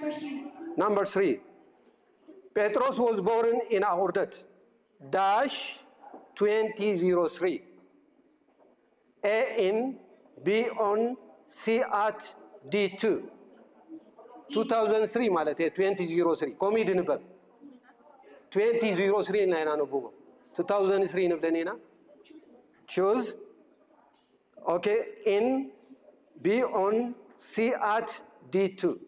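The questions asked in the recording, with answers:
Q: Petros was born in Ordet.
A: A: in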